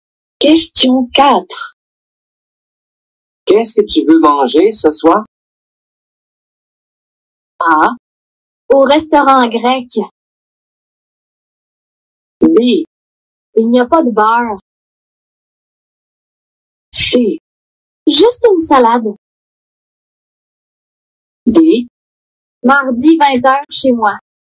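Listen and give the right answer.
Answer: C: Juste une salade.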